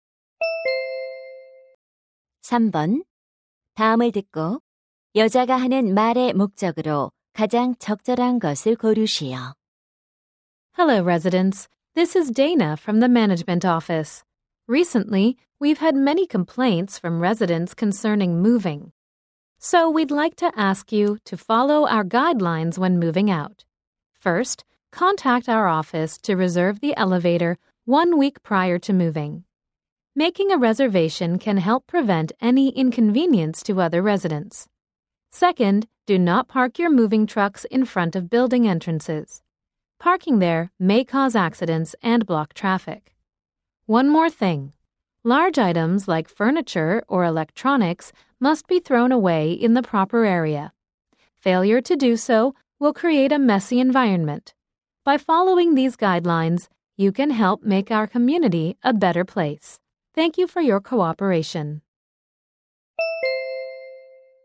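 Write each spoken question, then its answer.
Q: 다음을 듣고 여자가 하는 말의 목적으로 가장 적절한 것을 고르시오.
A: 이사할 때 관리사무소 지침을 따를 것을 요청하려고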